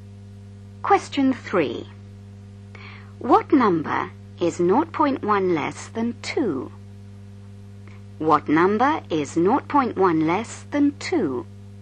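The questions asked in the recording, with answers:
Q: What number is 0.1 less than 2?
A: 1.9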